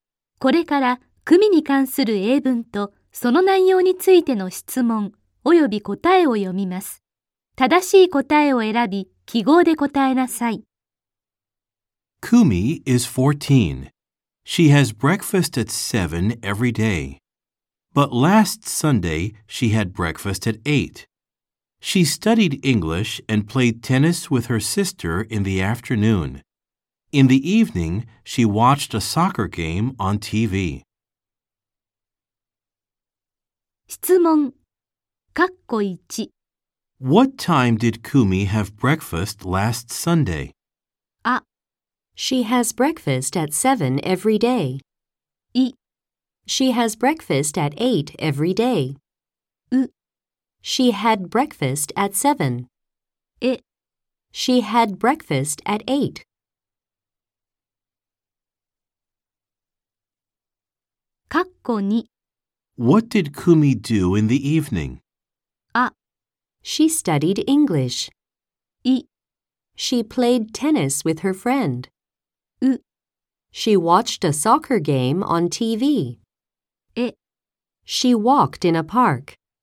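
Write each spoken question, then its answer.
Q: What time did Kumi have breakfast last Sunday?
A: エ: She had breakfast at 8.

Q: What did Kumi do in the evening?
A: ウ: She watched a soccer game on TV.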